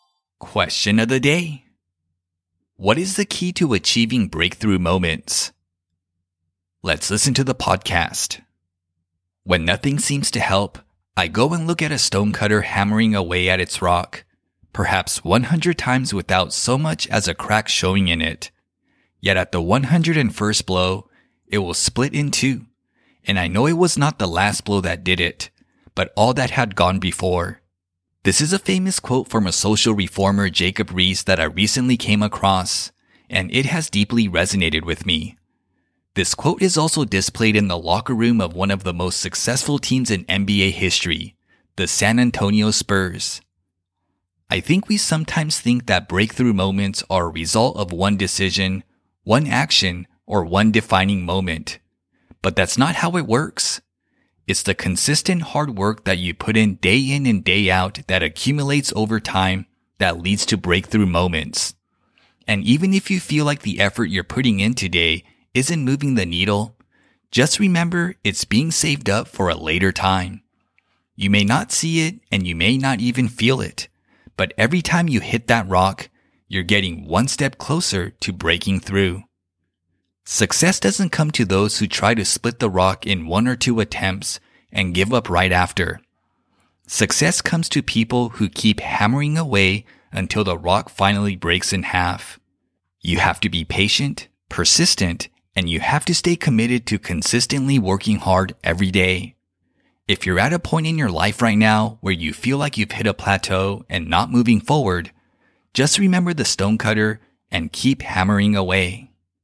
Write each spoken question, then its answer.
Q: What is the key to achieving breakthrough moments?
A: The key to achieving breakthrough moments is to consistently work hard every day.